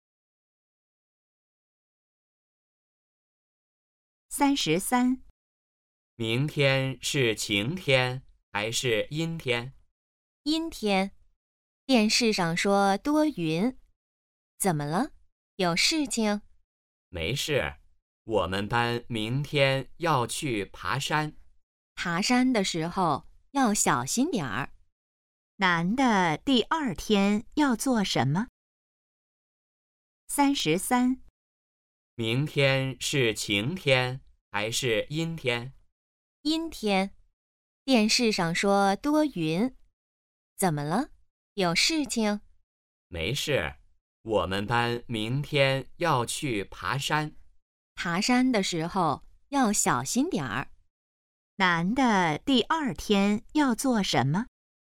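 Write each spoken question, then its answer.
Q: 男的第二天要做什么?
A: 去爬山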